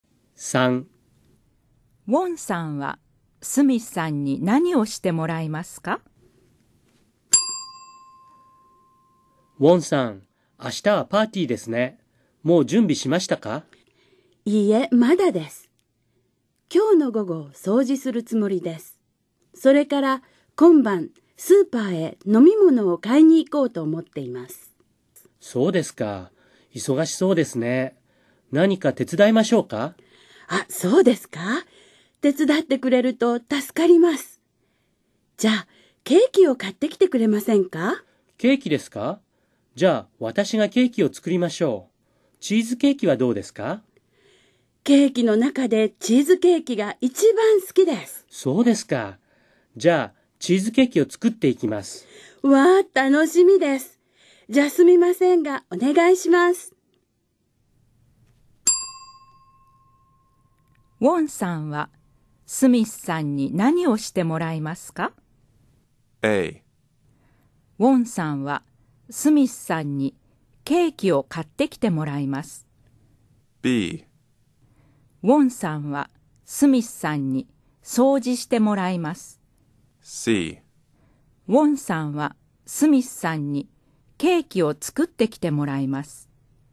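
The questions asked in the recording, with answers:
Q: ウォンさんはスミスさんに何をしてもらいますか?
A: C: ウォンさんはスミスさんにケーキを作ってきてもらいます。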